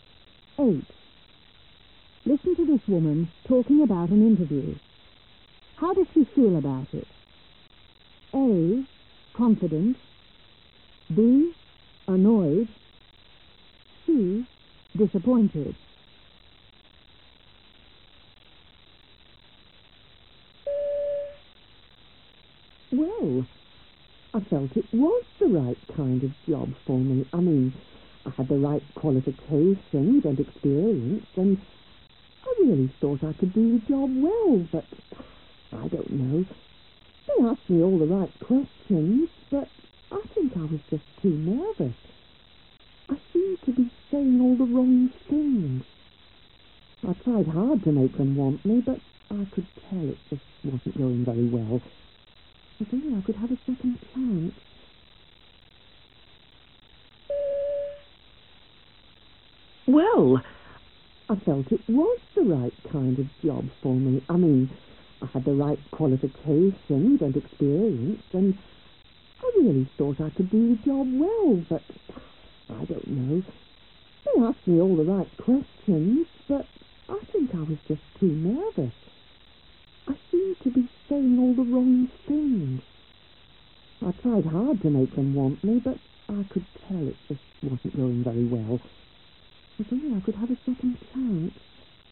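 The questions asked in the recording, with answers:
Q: How does she feel about it?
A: C: Disappointed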